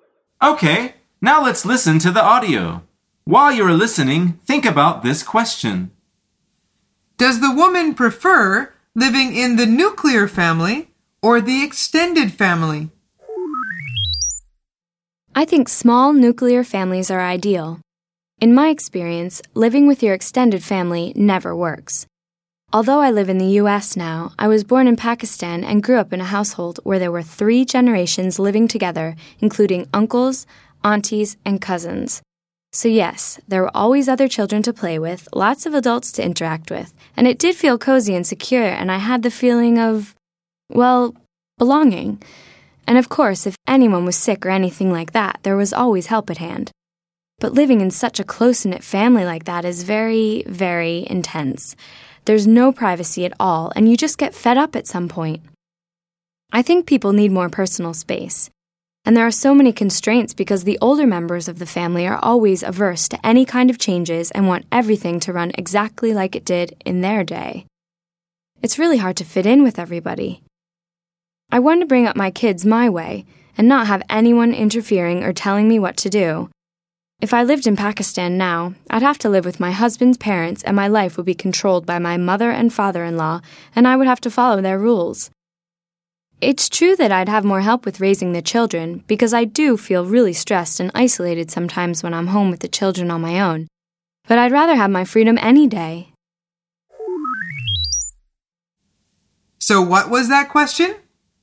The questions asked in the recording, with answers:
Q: Does the woman prefer living in the nuclear family or the extended family?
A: The answer is she prefers nuclear families.